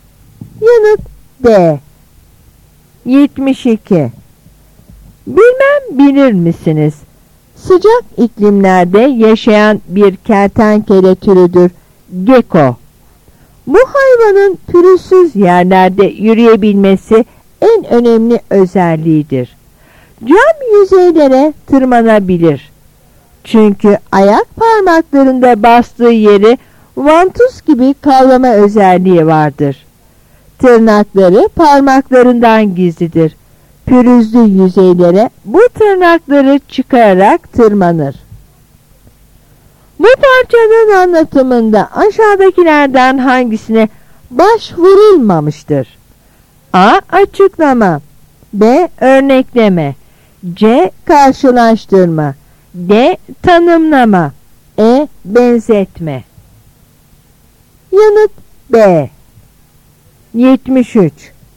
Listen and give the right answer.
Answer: Yanıt B.